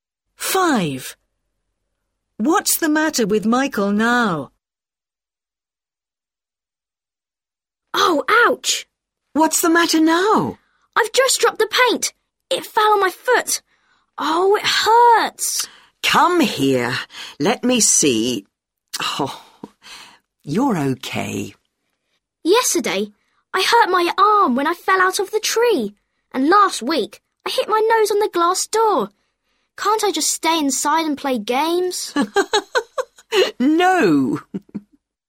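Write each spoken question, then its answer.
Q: What's the matter with Michael now?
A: he hurt his foot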